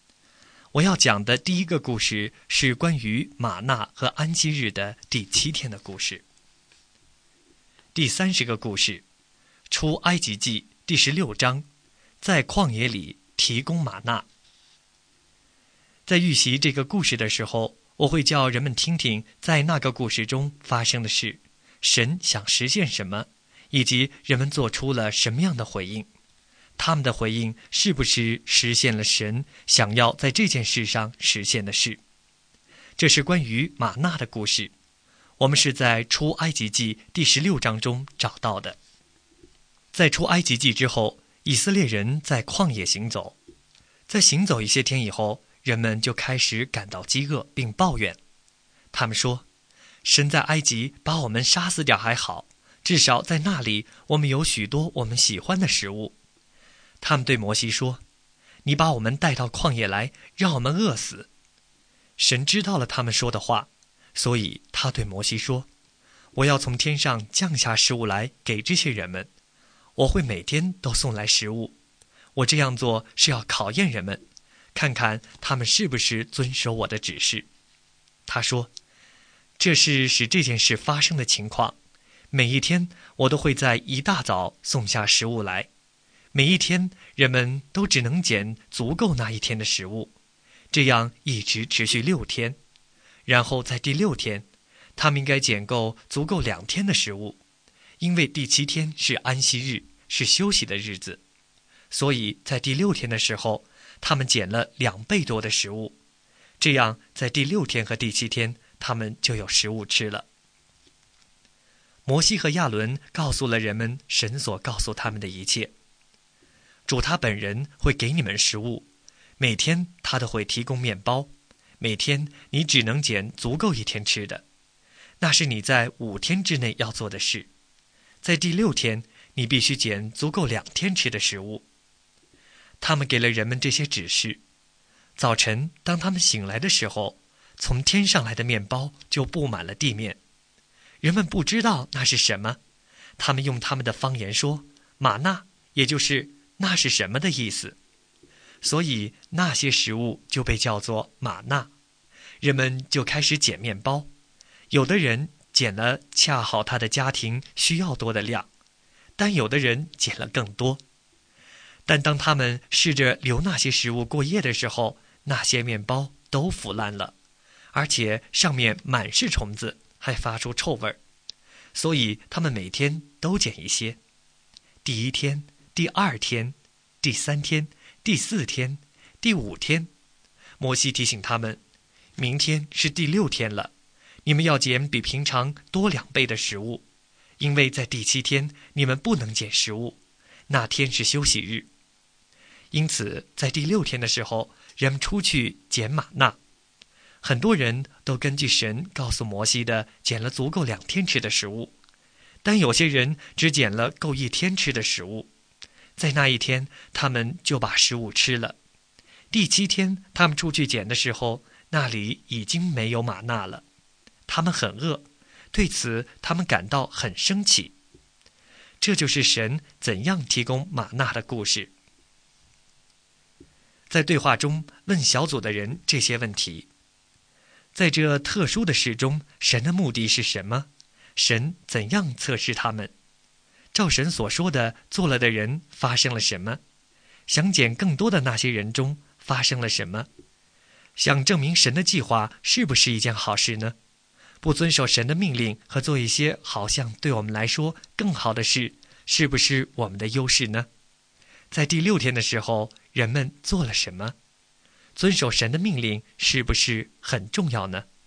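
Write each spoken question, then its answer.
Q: 神怎样测试他们?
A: 每天降下食物,看人们是否遵守他的指示:每天只捡够一天的,第六天捡两天的

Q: 想捡更多的那些人中发生了什么?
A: 留过夜的食物腐烂了,满是虫子,发出臭味

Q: 在第六天的时候,人们做了什么?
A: 很多人捡了足够两天吃的玛纳,但有些人只捡了够一天吃的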